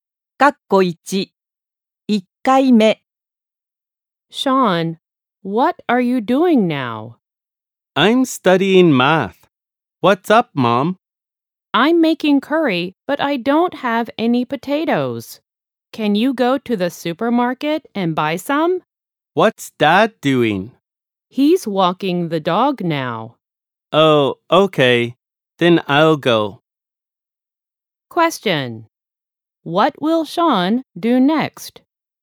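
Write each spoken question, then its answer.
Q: What will Sean do next?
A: He will go to the supermarket to buy potatoes.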